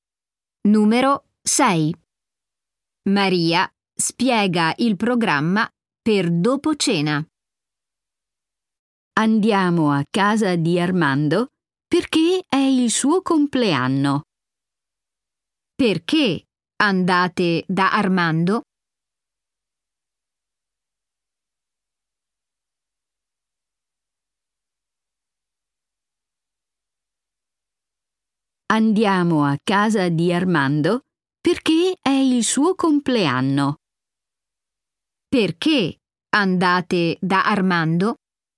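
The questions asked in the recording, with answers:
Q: Perché andate da Armando?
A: Perché è il suo compleanno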